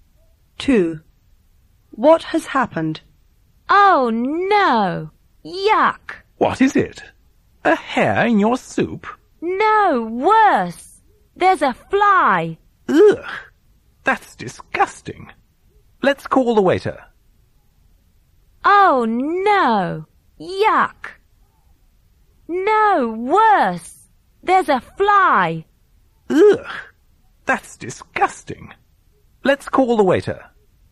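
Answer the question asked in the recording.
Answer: There's a fly in the soup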